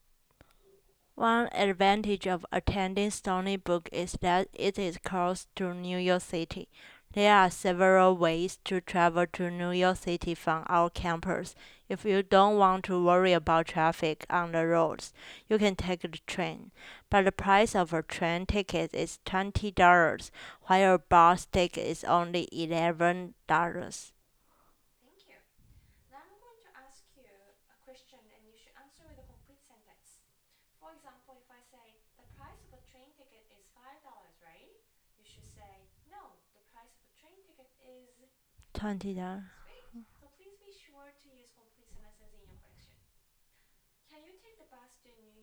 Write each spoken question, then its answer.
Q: Can you take the bus to New York City?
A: Yes, I can take the bus to New York City.